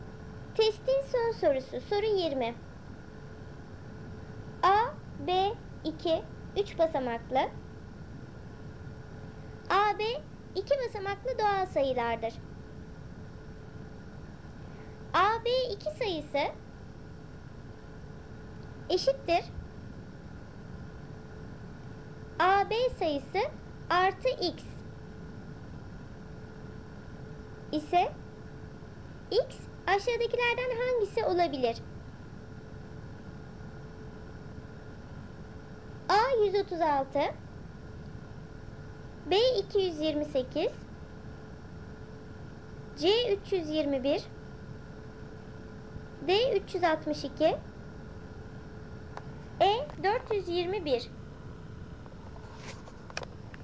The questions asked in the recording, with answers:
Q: ise X aşağıdakilerden hangisi olabilir?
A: Doğru cevap D 362.